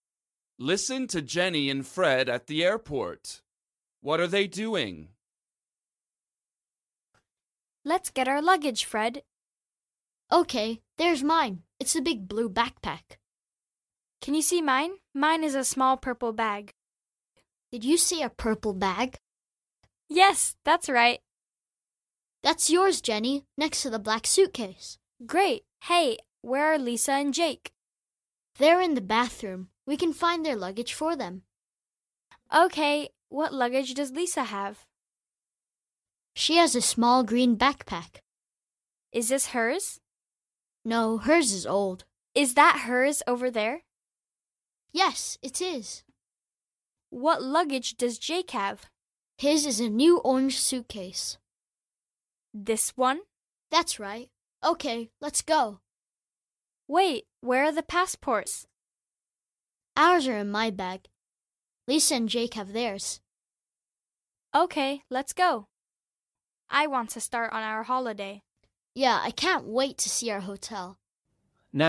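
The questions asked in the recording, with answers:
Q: What are they doing?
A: Getting their luggage at the airport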